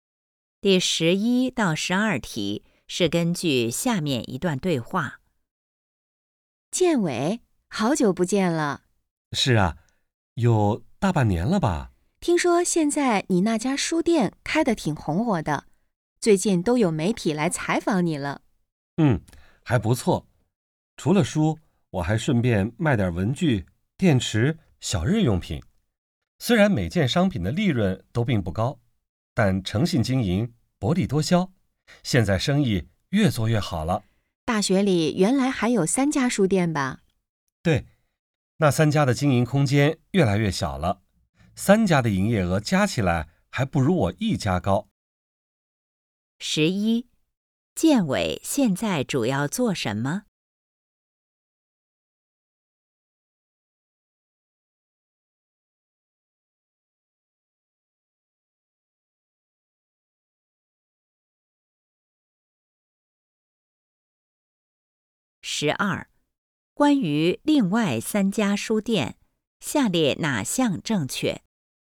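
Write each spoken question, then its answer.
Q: 建伟现在主要做什么?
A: 开书店

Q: 关于另外三家书店,下列哪项正确?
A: 经营空间越来越小,三家营业额加起来不如建伟一家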